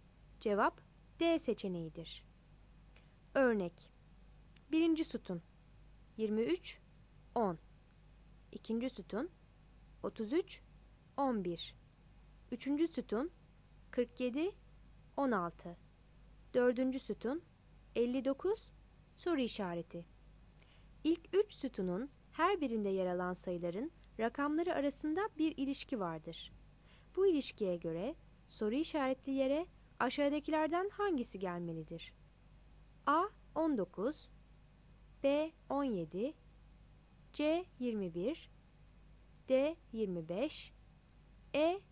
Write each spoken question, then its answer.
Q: Bu ilişkiye göre soru işaretli yere aşağıdakilerden hangisi gelmelidir?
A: Cevap A seçeneğidir.